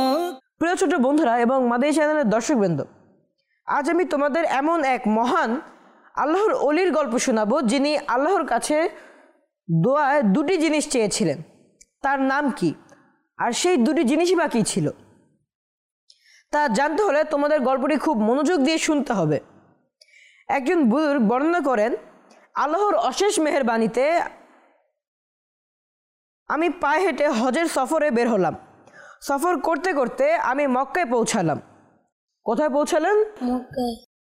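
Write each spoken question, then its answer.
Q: কোথায় পৌঁছালেন?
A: মক্কায়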